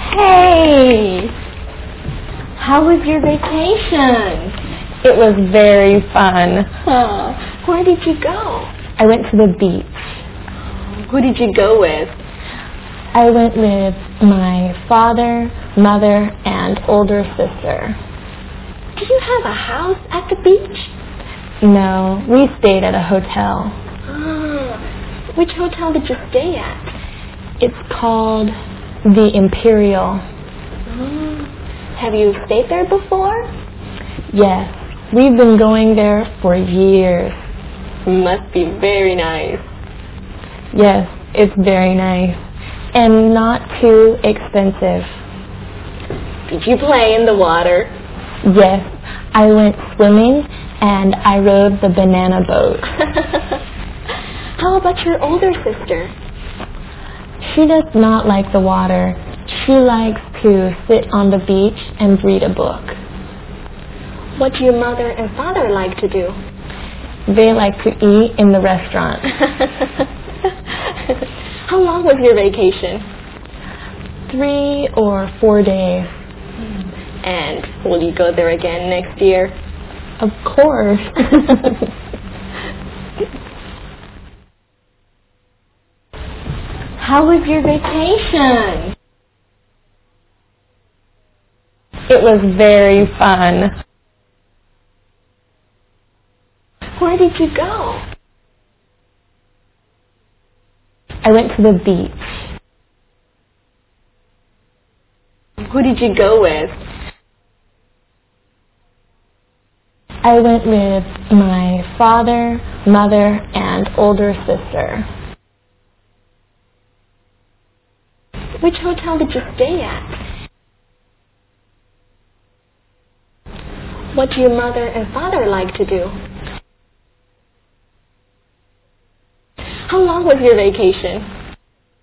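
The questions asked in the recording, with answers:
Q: Which hotel did you stay at?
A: The Imperial

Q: What do your mother and father like to do?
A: They like to eat in the restaurant.

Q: How long was your vacation?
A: 3 or 4 days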